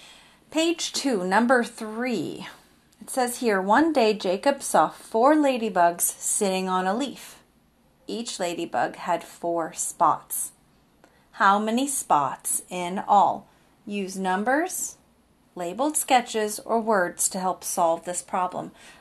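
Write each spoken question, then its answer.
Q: How many spots in all?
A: 16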